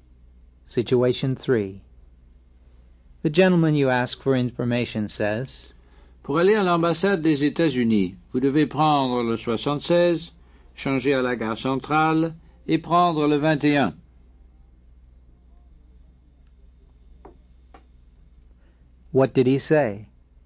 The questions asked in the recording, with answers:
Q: What did he say?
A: He said that in order to go to the U.S. Embassy, you have to take bus number 76, transfer at the central station, and take line 21.